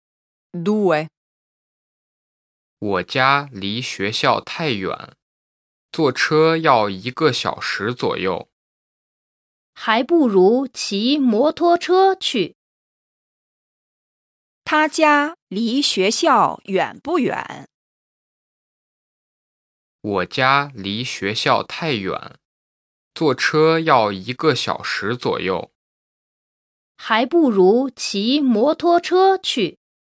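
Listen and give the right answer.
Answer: 很远,坐车要一个小时左右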